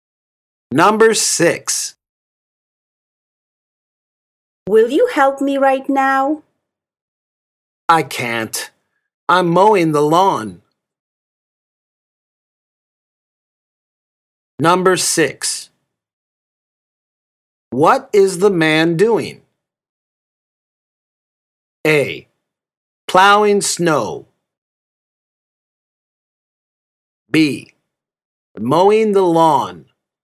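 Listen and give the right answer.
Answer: B: Mowing the lawn.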